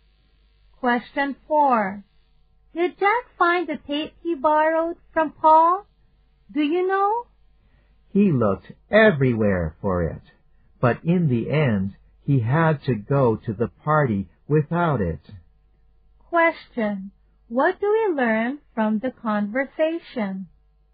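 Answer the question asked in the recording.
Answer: Jack didn't find the tape and went to the party without it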